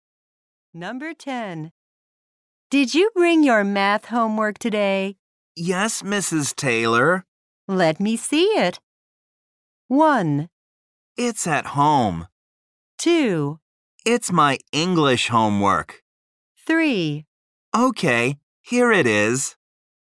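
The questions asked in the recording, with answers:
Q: Let me see it.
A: 3: Okay, here it is.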